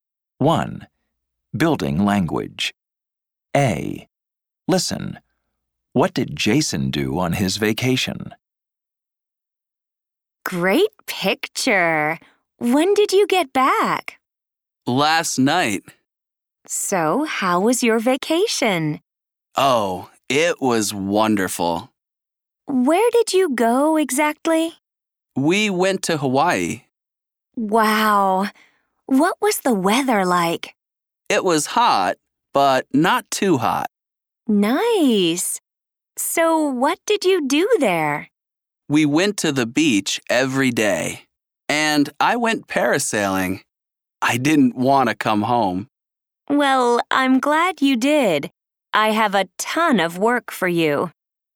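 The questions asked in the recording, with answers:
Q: What did Jason do on his vacation?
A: He went to Hawaii, went to the beach every day, and went parasailing.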